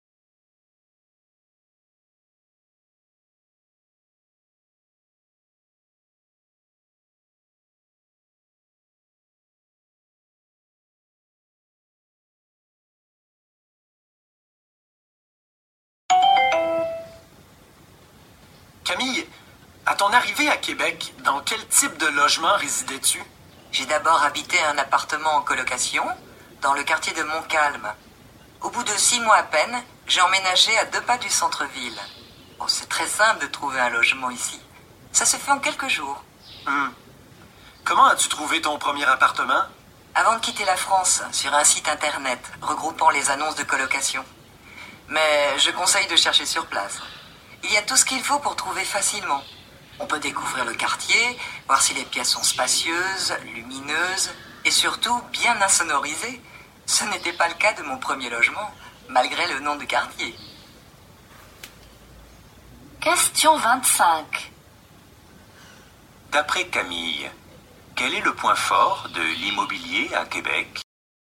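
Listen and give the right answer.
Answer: Il est très facile et rapide de trouver un logement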